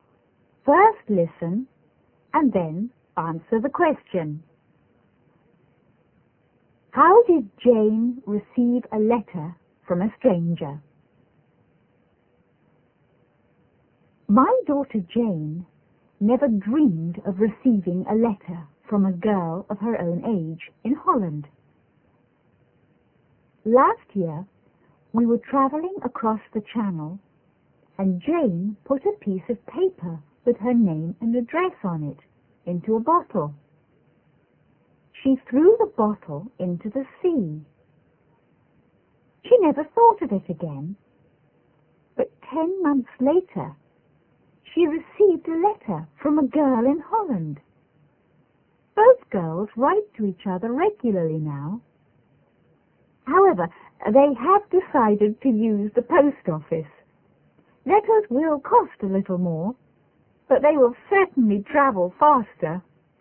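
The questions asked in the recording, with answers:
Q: How did Jane receive a letter from a stranger?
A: She put her name and address in a bottle and threw it into the sea; a girl in Holland found it and wrote to her.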